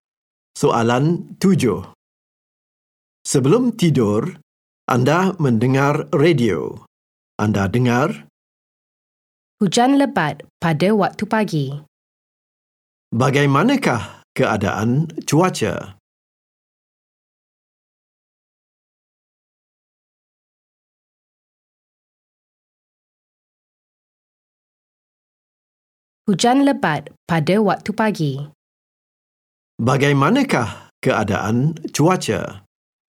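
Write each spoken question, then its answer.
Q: Bagaimanakah keadaan cuaca?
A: Hujan lebat pada waktu pagi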